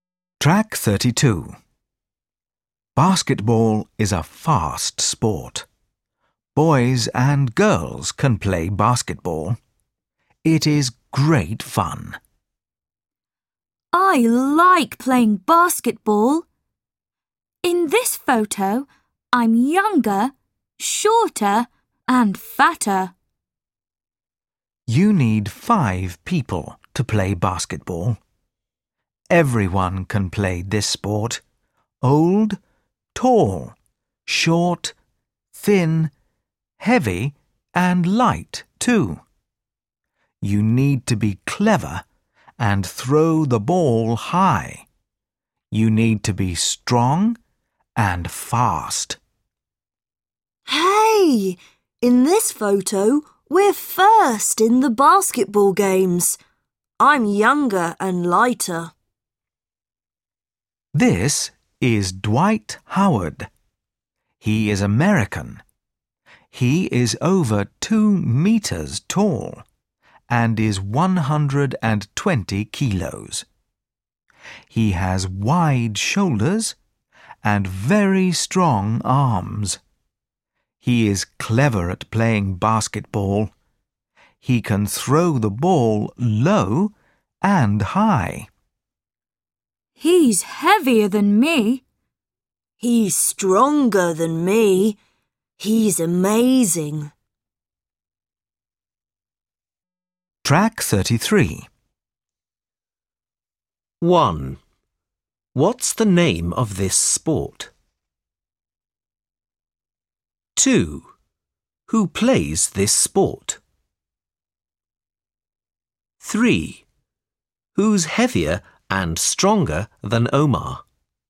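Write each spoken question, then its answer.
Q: What's the name of this sport?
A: Basketball

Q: Who plays this sport?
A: Everyone: boys and girls, old, young, tall, short, heavy and light people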